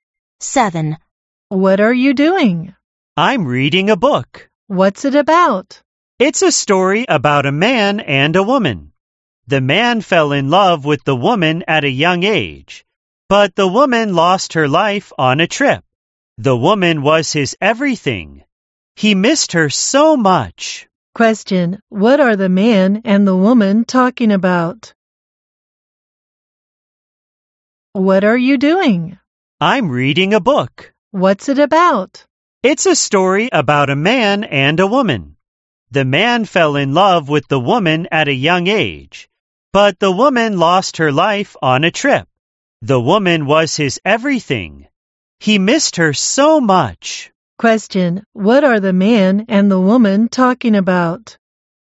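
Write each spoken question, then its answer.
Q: Question: what are the man and the woman talking about?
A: A book (a love story)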